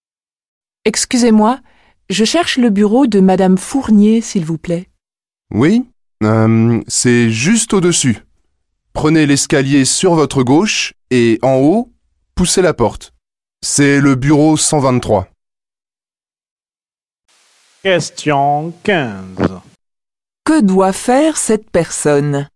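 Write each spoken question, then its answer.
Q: Que doit faire cette personne ?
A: Prendre l'escalier à gauche jusqu'au bureau 123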